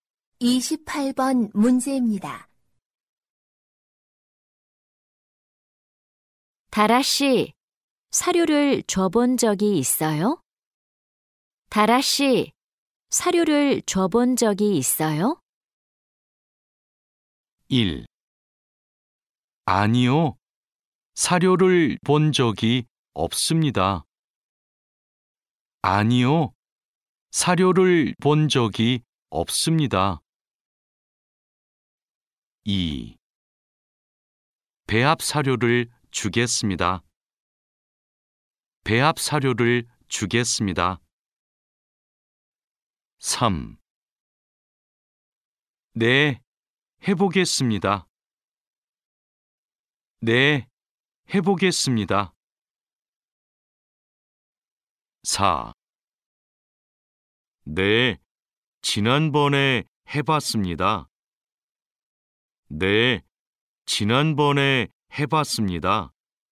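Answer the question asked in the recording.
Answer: 4: 네, 지난번에 해봤습니다.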